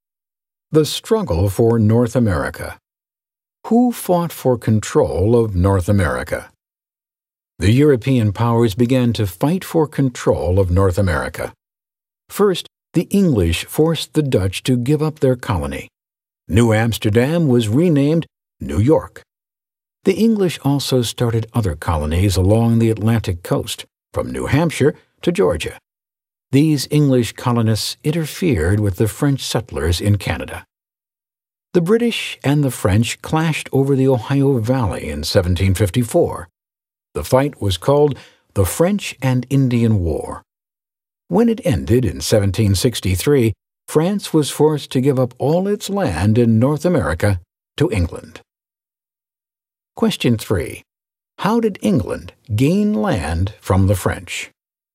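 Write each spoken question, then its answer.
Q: How did England gain land from the French?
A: By winning the French and Indian War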